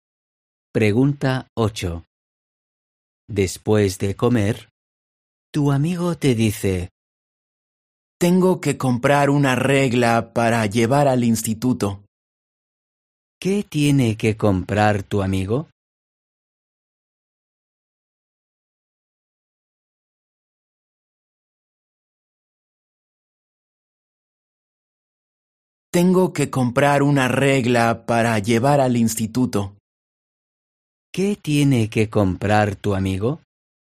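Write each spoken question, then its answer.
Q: ¿Qué tiene que comprar tu amigo?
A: una regla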